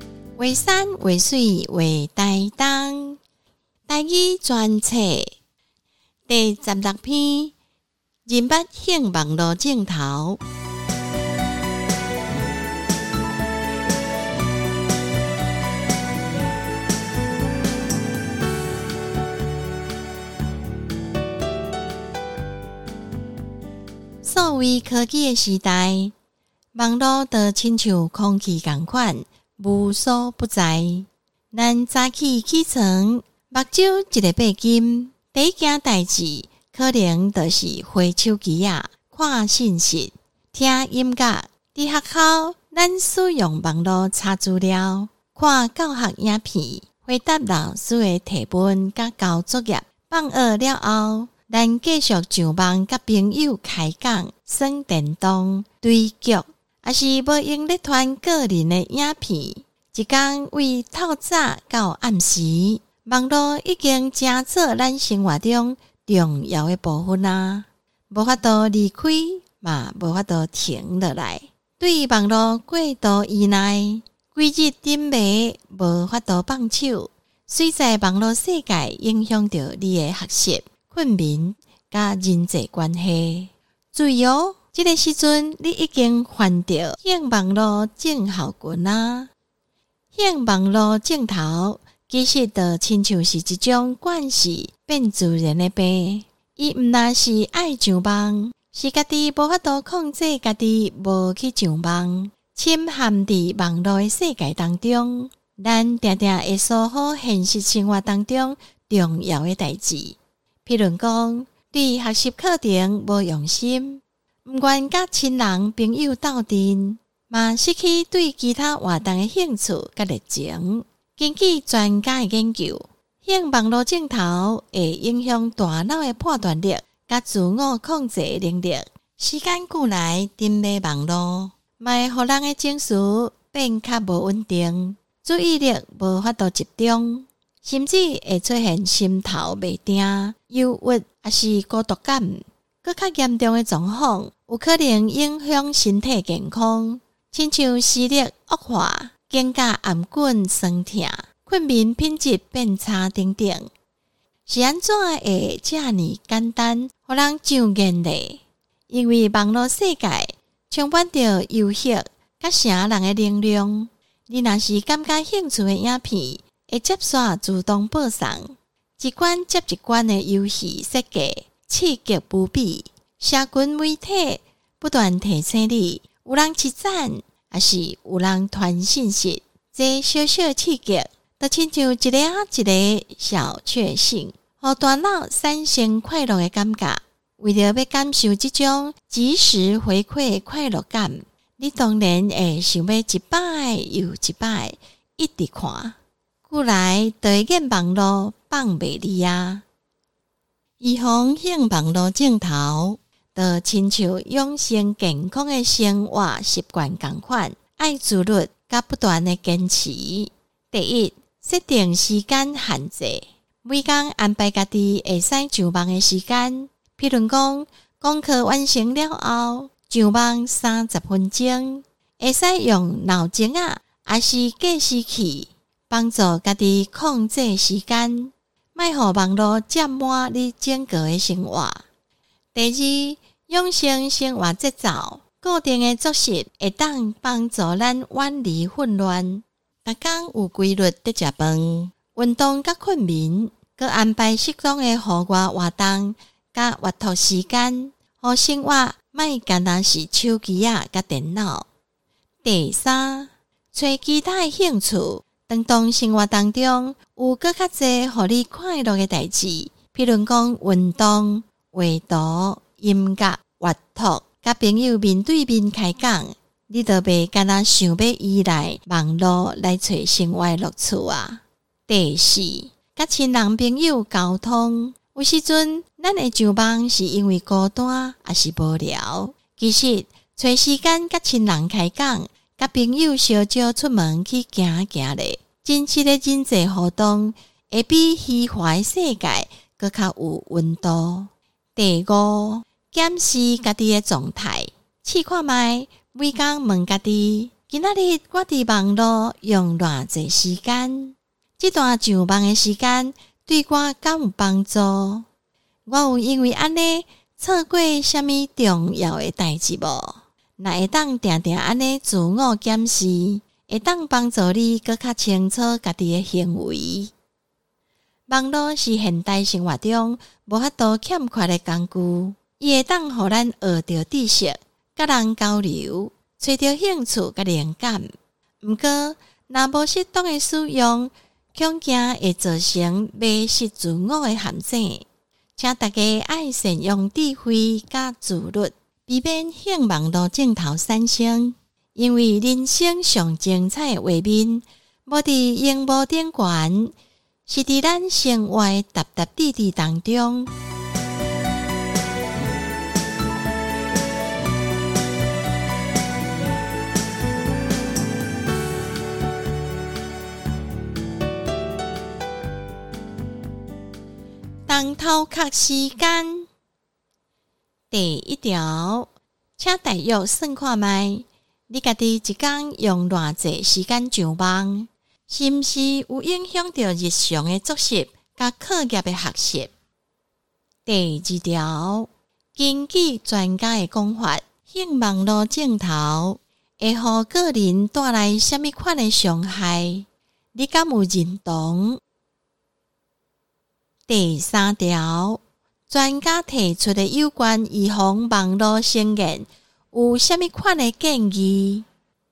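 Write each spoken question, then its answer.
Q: 根据专家的讲法,向网络尽头会乎个人带来虾米款的伤害?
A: 它会影响大脑的判断力和自我控制能力,让情绪不稳定、注意力无法集中,甚至出现心神不宁、忧郁或孤独感;严重时会伤害身体健康,例如视力恶化、肩颈酸痛、睡眠品质变差。

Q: 专家提出的有关预防网络成瘾有什么款的建议?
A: 一、设定上网时间限制;二、养成规律的生活作息;三、寻找其他兴趣;四、多和亲人朋友沟通;五、每天检视自己的上网状态。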